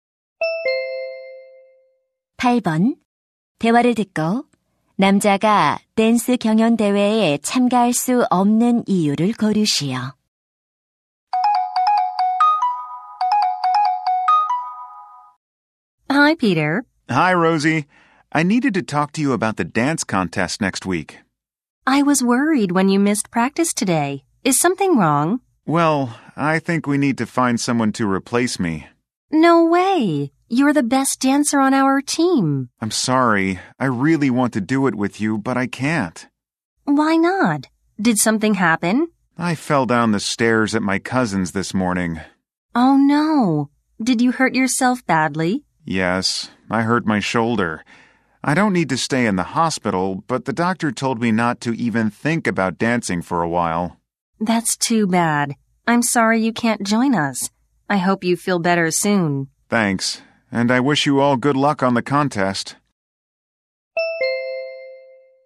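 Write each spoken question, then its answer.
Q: 대화를 듣고 남자가 댄스 경연 대회에 참가할 수 없는 이유를 고르시오.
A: 계단에서 넘어져 어깨를 다쳐서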